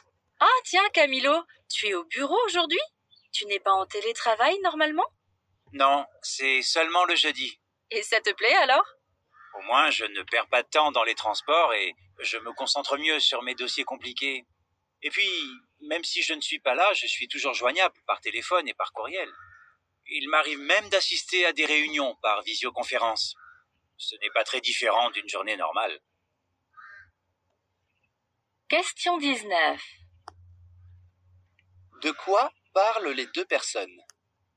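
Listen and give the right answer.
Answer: Du télétravail de Camilo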